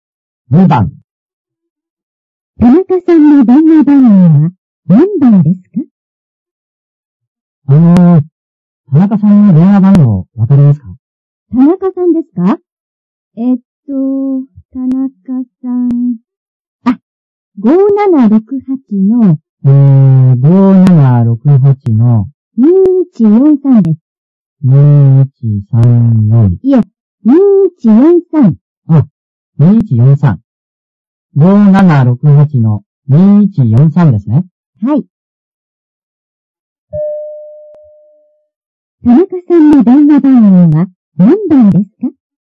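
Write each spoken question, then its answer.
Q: 田中さんの電話番号は何番ですか?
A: 5768の2143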